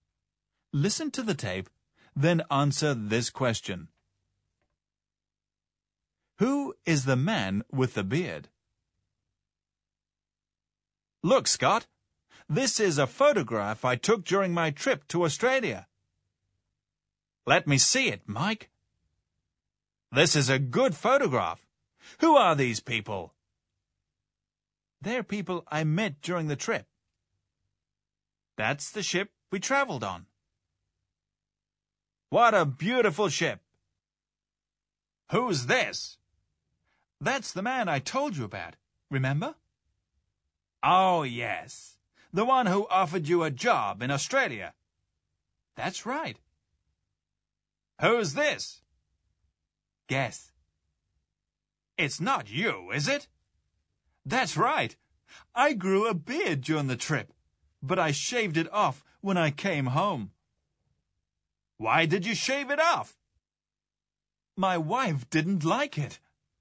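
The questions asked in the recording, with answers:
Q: Who is the man with the beard?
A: Mike, the speaker himself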